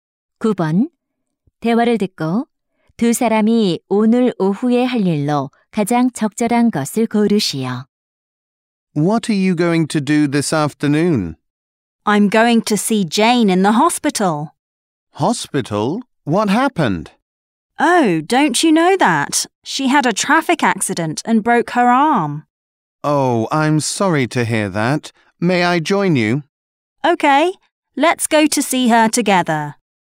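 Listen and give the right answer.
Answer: 병원에 있는 Jane 병문안 가기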